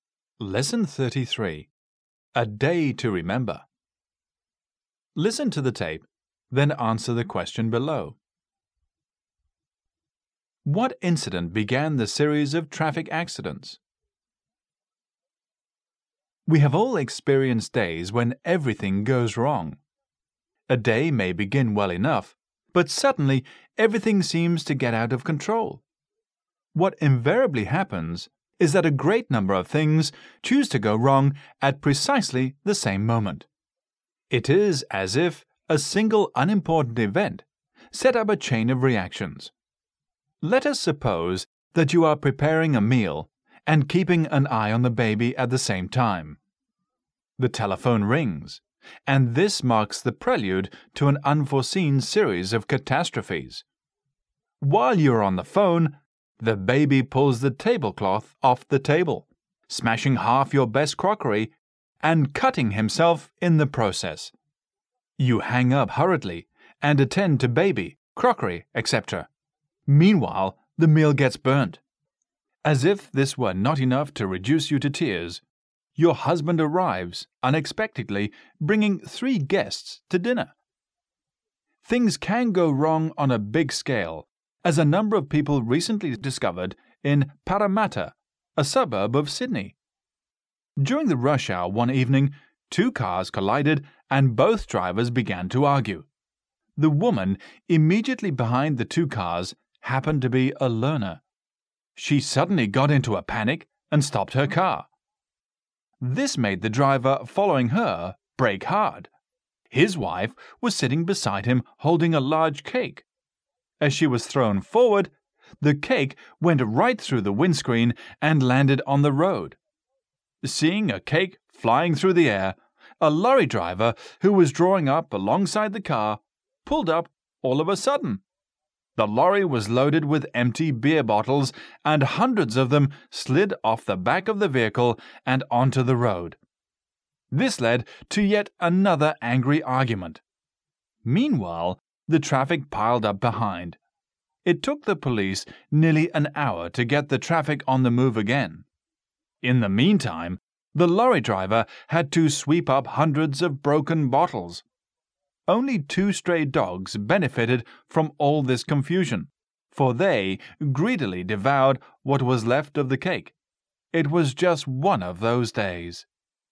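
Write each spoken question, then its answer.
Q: What incident began the series of traffic accidents?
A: Two cars collided during the rush hour and both drivers began to argue.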